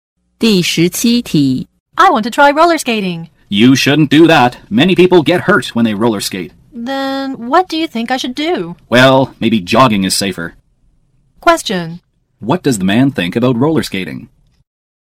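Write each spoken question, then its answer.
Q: What does the man think about roller skating?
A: It's dangerous.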